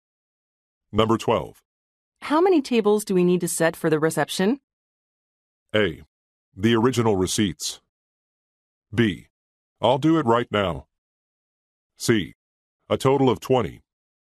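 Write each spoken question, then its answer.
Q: How many tables do we need to set for the reception?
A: C: A total of 20.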